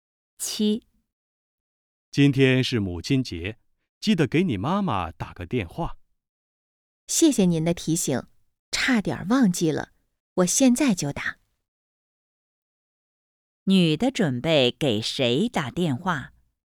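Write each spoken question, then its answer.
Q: 女的准备给谁打电话?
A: 她妈妈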